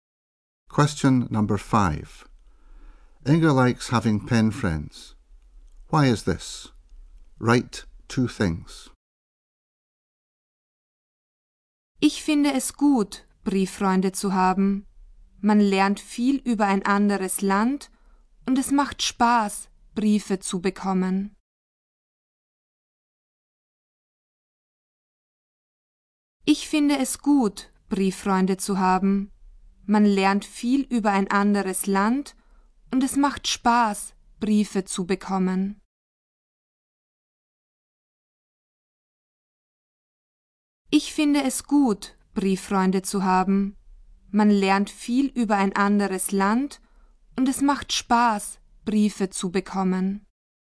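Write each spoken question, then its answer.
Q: Why is this?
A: You learn a lot about another country and it is fun to get letters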